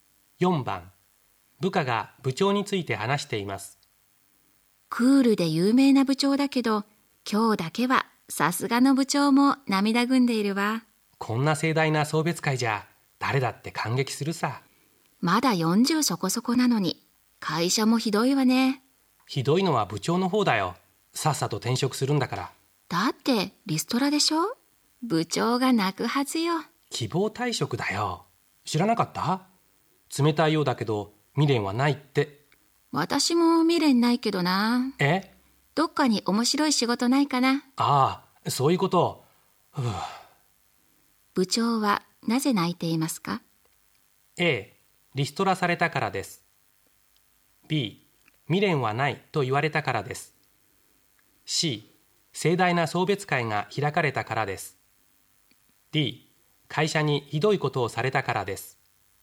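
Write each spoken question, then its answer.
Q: 部長はなぜ泣いていますか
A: C: 盛大な送別会が開かれたからです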